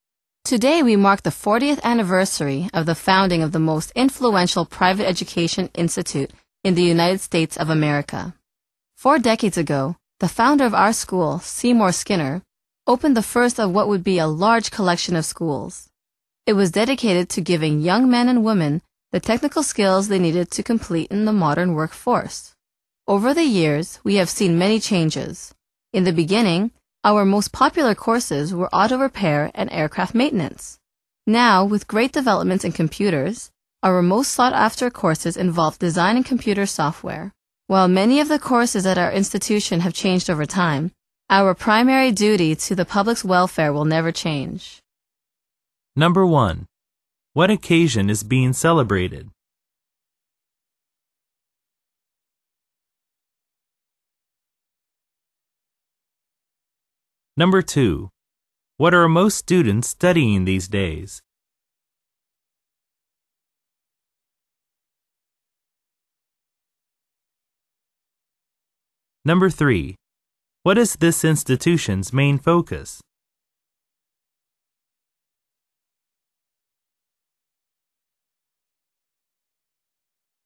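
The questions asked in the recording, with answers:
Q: What occasion is being celebrated?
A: The 40th anniversary of the school's founding

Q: What are most students studying these days?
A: Design and computer software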